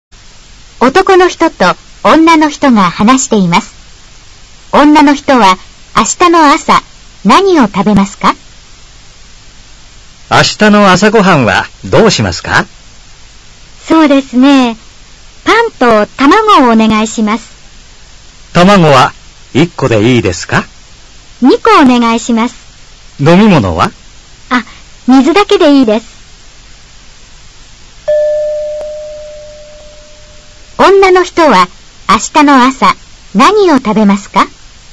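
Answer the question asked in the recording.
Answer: パンと卵2個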